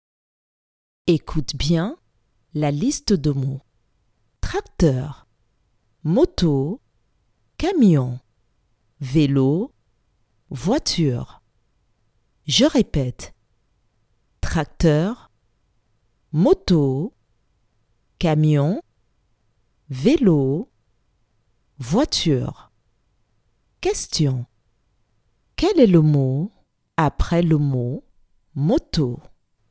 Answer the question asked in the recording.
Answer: Le mot après le mot moto est le mot camion.